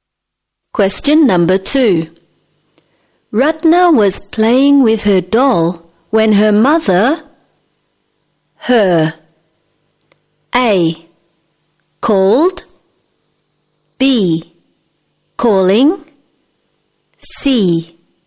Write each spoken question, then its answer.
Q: Ratna was playing with her doll when her mother,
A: Jawaban yang tepat adalah A.